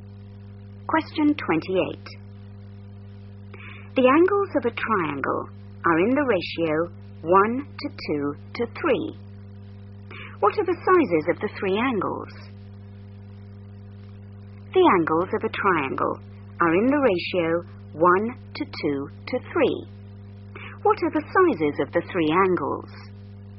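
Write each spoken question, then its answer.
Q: What are the sizes of the three angles?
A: 30, 60 and 90 degrees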